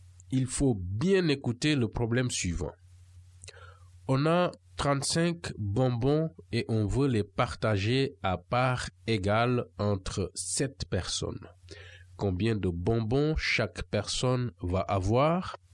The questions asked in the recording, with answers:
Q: Combien de bonbons chaque personne va avoir?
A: Eh bien, à la fin, chaque cercle a 5 petits traits qui montrent les bonbons.